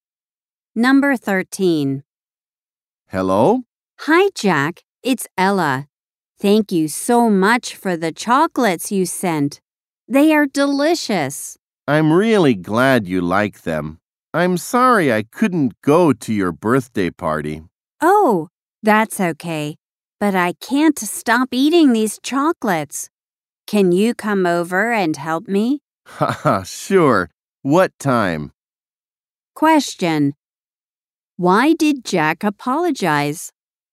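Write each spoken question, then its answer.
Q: Why did Jack apologize?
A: He couldn't go to Ella's birthday party.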